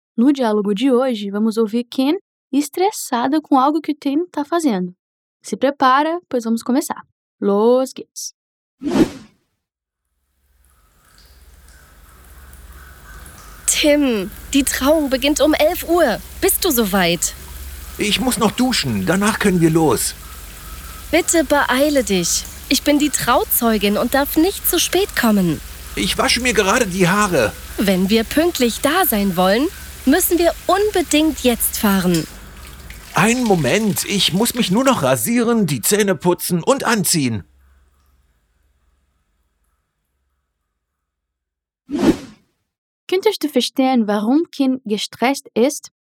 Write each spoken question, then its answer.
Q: Könntest du verstehen, warum Kim gestresst ist?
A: Der Grund hängt mit einer Trauung zusammen.